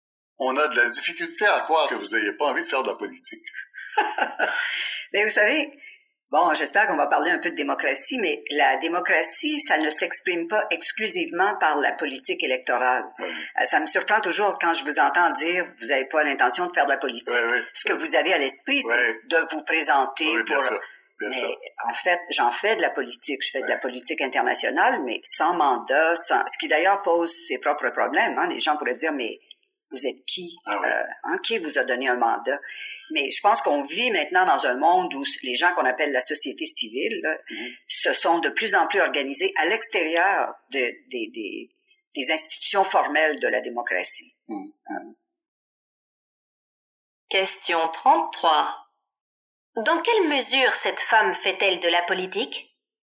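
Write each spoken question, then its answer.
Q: Dans quelle mesure cette femme fait-elle de la politique ?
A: Elle fait de la politique internationale, mais sans mandat électoral, à travers la société civile.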